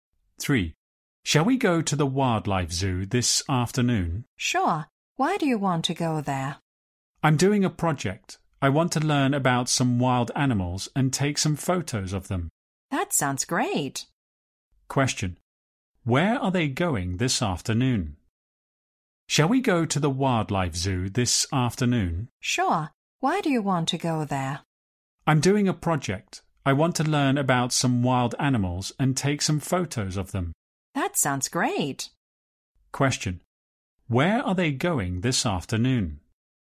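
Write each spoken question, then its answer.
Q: Where are they going this afternoon?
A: To the wildlife zoo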